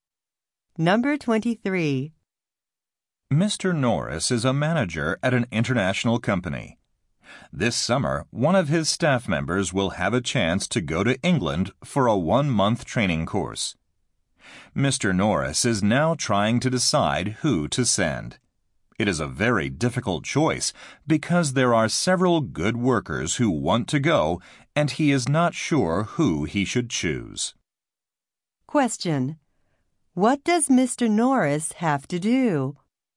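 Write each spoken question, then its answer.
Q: What does Mr. Norris have to do?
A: Choose a worker to send to England for training.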